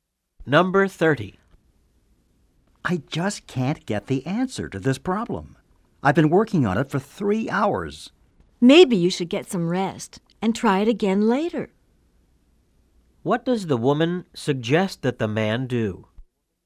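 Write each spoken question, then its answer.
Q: What does the woman suggest that the man do?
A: Get some rest and try the problem again later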